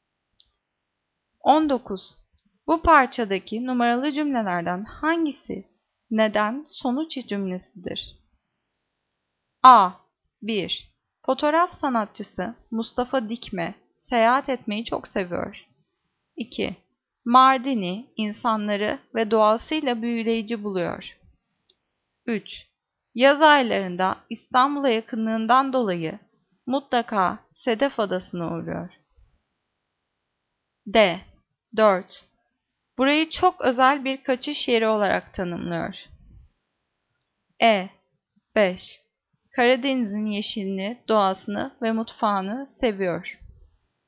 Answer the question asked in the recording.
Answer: Cevap C. 3. Yaz aylarında İstanbul'a yakınlığından dolayı mutlaka Sedef Adası'na uğruyor.